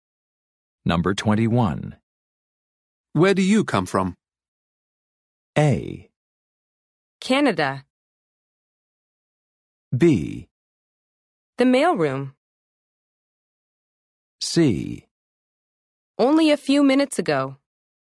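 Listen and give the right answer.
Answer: A: Canada.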